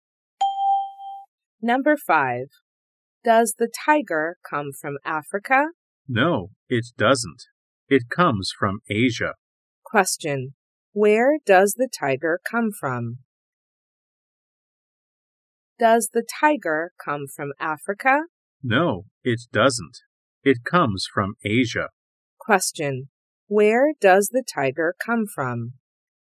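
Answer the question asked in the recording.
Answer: Asia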